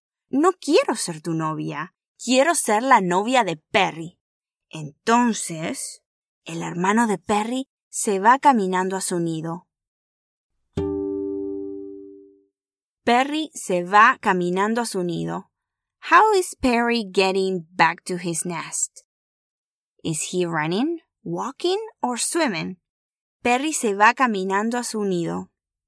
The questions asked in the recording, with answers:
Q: How is Perry getting back to his nest? Is he running, walking or swimming?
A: Tienes razón. Perry se va caminando a su nido.